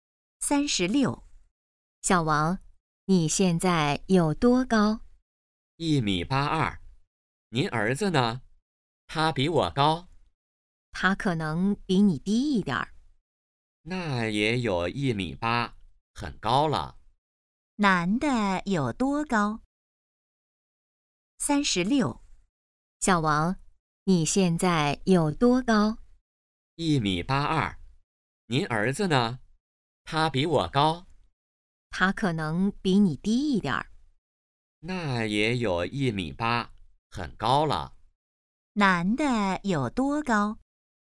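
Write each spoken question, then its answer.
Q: 男的有多高?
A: 1.82米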